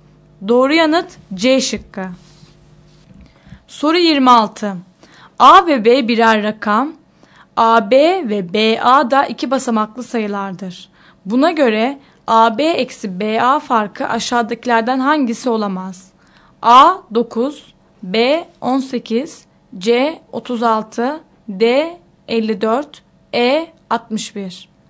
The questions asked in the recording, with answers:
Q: Buna göre AB eksi BA farkı aşağıdakilerden hangisi olamaz?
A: Doğru yanıt E şıkkı.